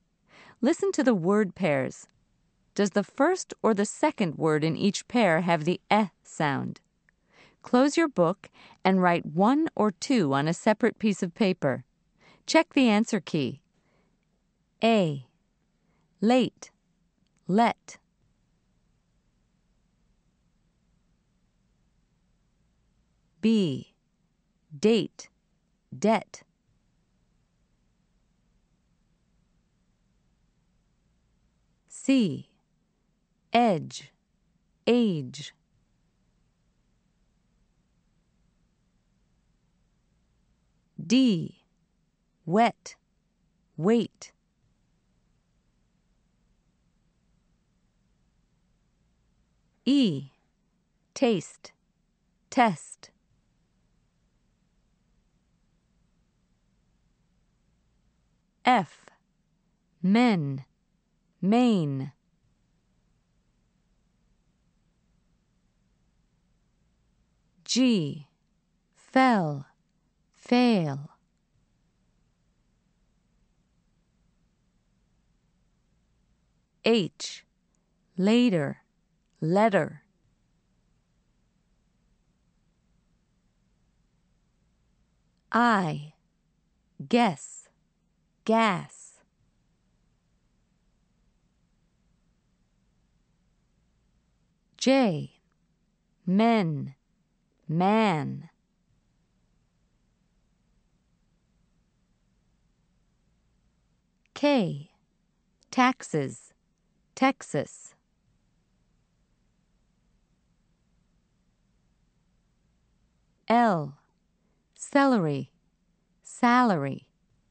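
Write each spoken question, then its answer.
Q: Does the first or the second word in each pair have the eh sound?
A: second (let)

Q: Does the first or the second word in each pair have the eh sound?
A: second (debt)

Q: Does the first or the second word in each pair have the eh sound?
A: first (edge)

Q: Does the first or the second word in each pair have the eh sound?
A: first (wet)

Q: Does the first or the second word in each pair have the eh sound?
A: second (test)

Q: Does the first or the second word in each pair have the eh sound?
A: first (men)

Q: Does the first or the second word in each pair have the eh sound?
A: first (fell)

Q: Does the first or the second word in each pair have the eh sound?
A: second (letter)

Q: Does the first or the second word in each pair have the eh sound?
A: first (guess)

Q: Does the first or the second word in each pair have the eh sound?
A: first (men)

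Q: Does the first or the second word in each pair have the eh sound?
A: second (Texas)

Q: Does the first or the second word in each pair have the eh sound?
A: first (celery)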